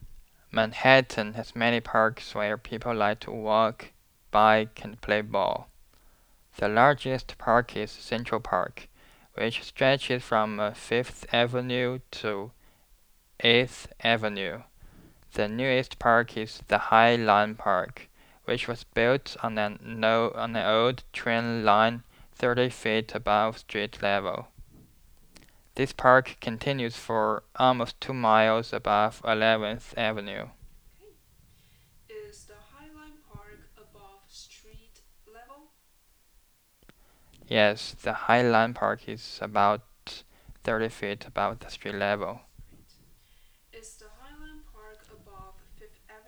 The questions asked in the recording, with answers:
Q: Is the High Line Park above 5th Avenue?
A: The Highland Park is not above the 5th Avenue.